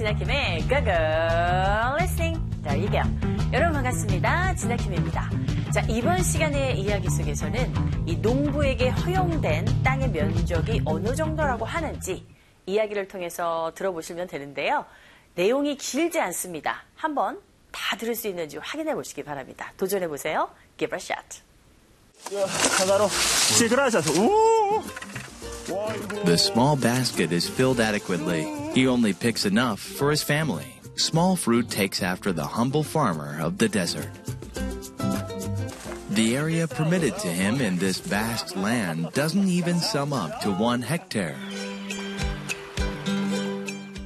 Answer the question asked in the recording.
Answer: 네, 1헥타르조차도 되지 않는다.